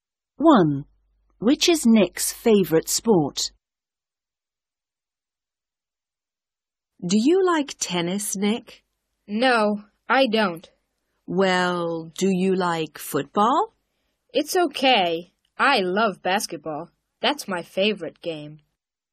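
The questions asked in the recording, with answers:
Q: Which is Nick's favourite sport?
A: basketball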